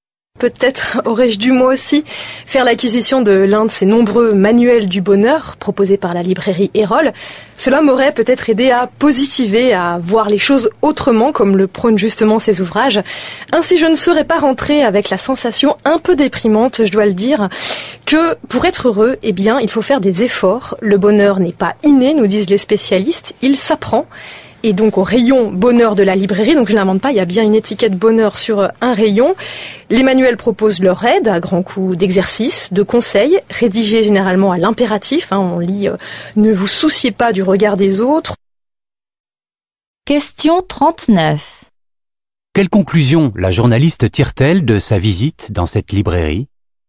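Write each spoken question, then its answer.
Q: Quelle conclusion la journaliste tire-t-elle de sa visite dans cette librairie ?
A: Pour être heureux, il faut faire des efforts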